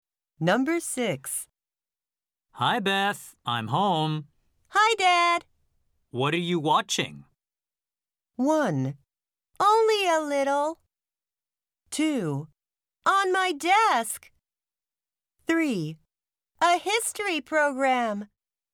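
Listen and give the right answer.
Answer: 3: A history program.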